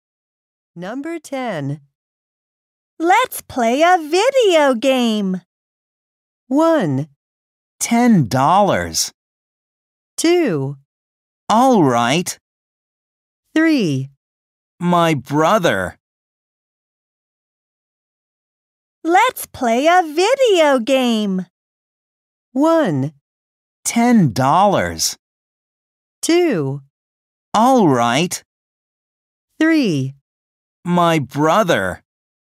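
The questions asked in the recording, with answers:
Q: Let's play a video game.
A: 2: All right.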